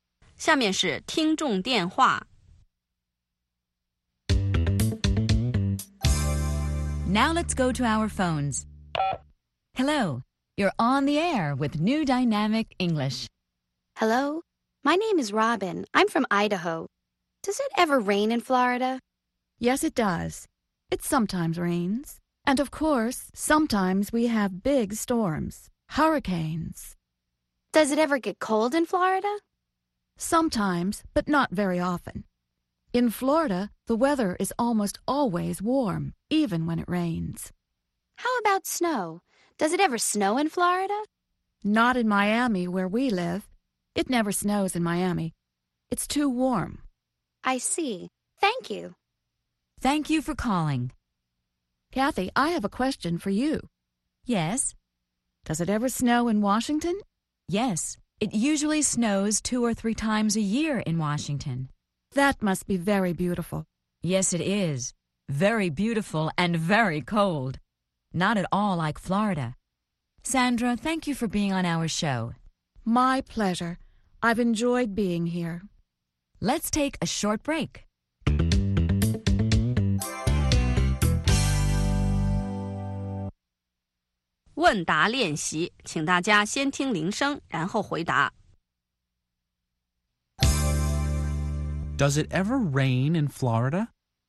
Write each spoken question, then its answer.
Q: Does it ever rain in Florida?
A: Yes, it does. It sometimes rains.